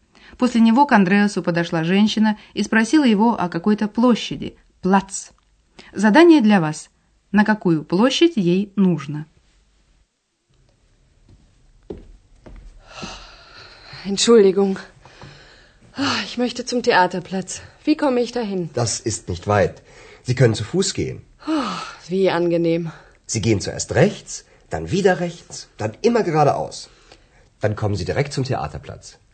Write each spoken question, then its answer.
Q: На какую площадь ей нужно?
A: Женщина ищет театральную площадь, театрплац.